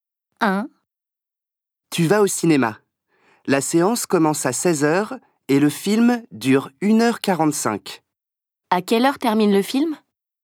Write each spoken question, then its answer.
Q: À quelle heure termine le film ?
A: À 17h45.